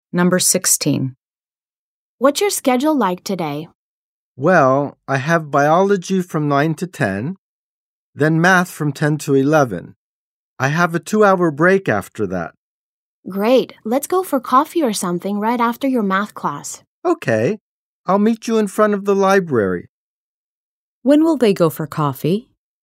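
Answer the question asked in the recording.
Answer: At 11, right after math class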